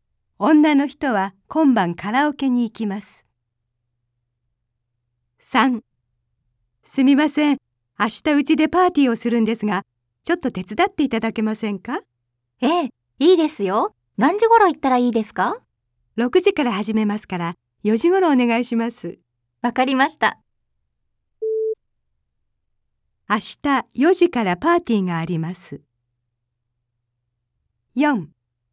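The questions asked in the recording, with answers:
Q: 明日4時からパーティーがあります。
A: 正しくない(×):パーティーは6時から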